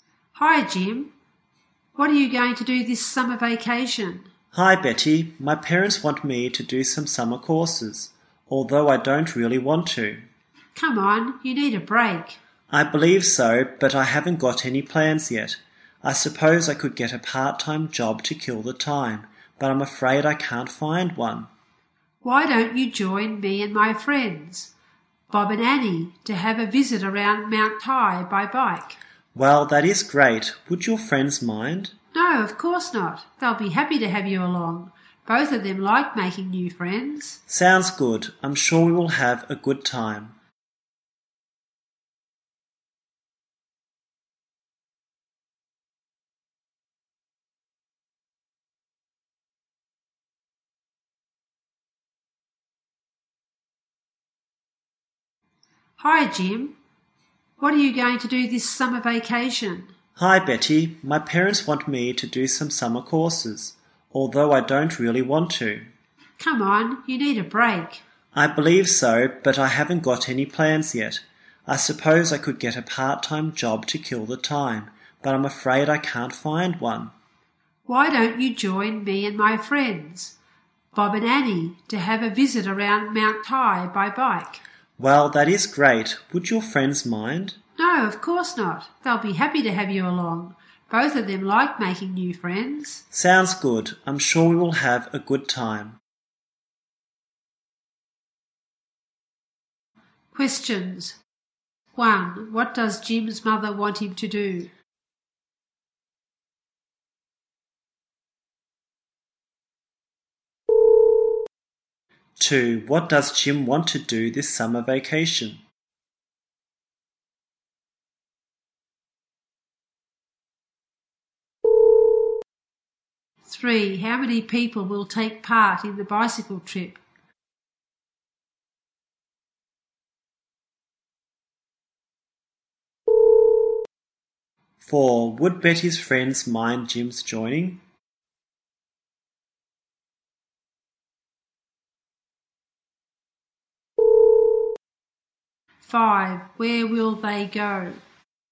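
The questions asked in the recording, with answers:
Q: What does Jim's mother want him to do?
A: Do some summer courses.

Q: How many people will take part in the bicycle trip?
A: Four.

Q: Would Betty's friends mind Jim's joining?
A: No, they wouldn't.

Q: Where will they go?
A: Mount Tai.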